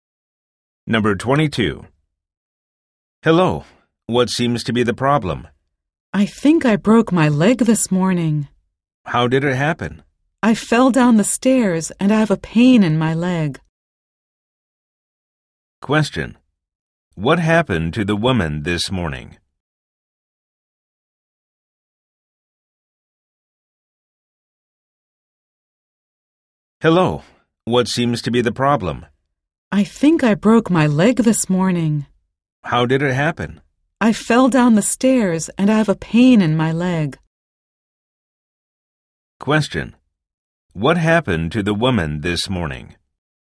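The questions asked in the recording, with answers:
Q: What happened to the woman this morning?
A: She fell down the stairs and hurt (maybe broke) her leg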